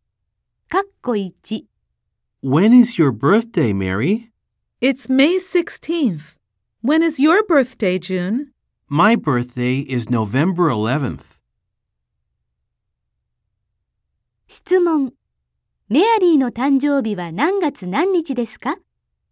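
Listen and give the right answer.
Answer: 5月16日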